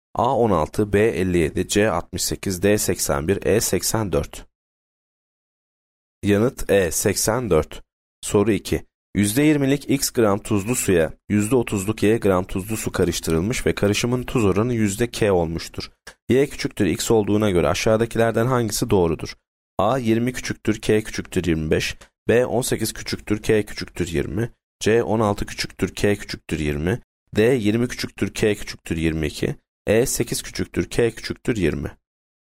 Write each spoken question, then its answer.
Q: Y küçüktür x olduğuna göre aşağıdakilerden hangisi doğrudur?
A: Yanıt A 20 küçüktür k küçüktür 25.